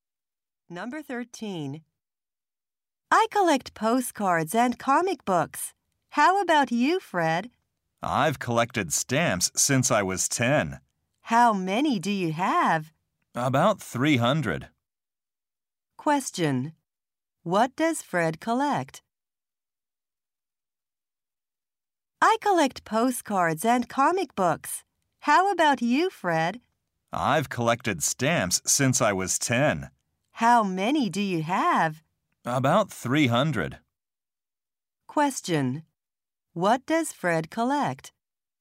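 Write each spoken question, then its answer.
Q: What does Fred collect?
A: Stamps.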